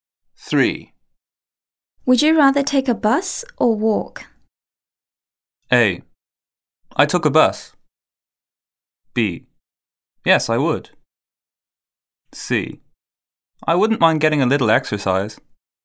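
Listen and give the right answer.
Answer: C: I wouldn't mind getting a little exercise.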